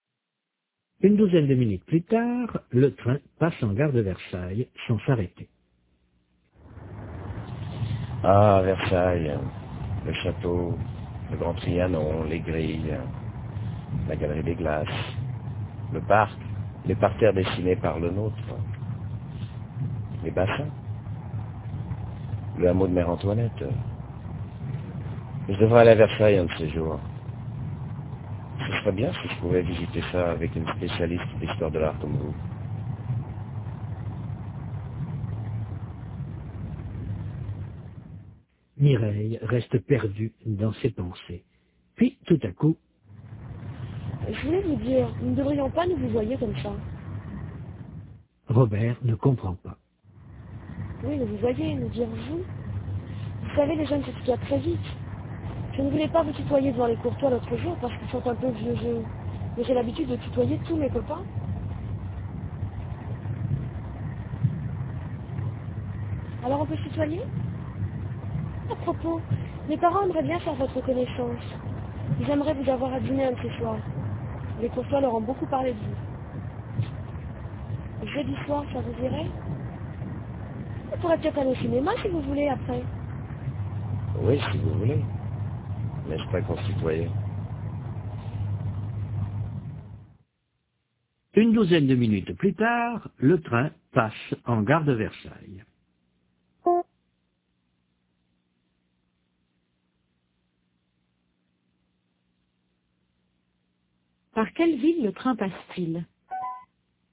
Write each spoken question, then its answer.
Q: Par quelle ville le train passe-t-il ?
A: Par Versailles.